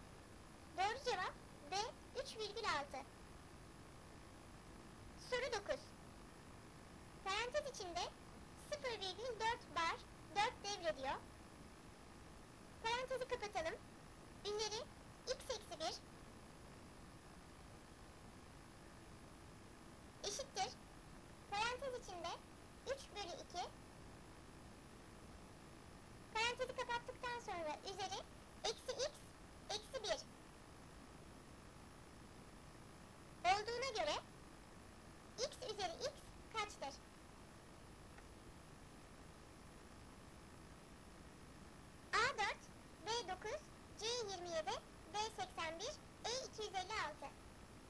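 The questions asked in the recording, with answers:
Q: Olduğuna göre x üzeri x kaçtır?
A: C: 27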